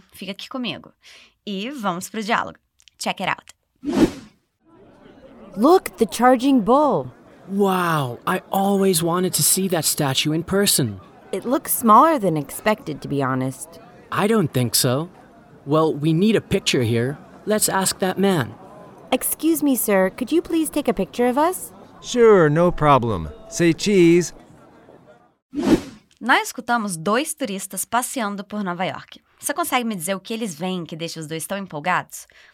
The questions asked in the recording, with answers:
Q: Você consegue me dizer o que eles veem que deixa os dois tão empolgados?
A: É uma estátua. Em Nova York tem uma estátua bem famosa de um touro de bronze.